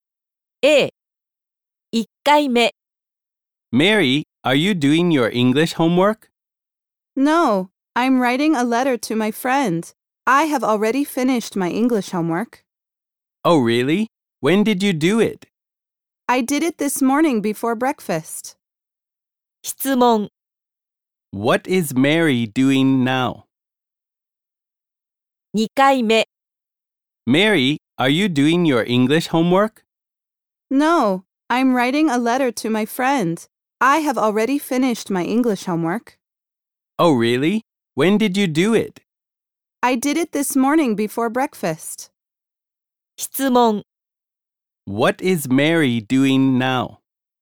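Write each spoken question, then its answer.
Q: What is Mary doing now?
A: She is writing a letter to her friend.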